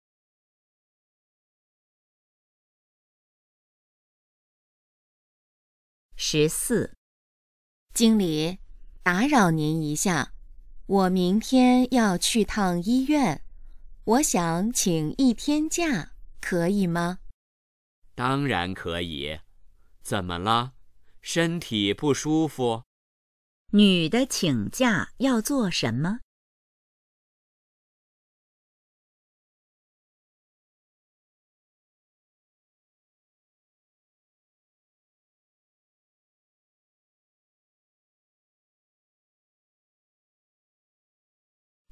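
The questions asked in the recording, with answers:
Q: 女的请假要做什么?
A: 去医院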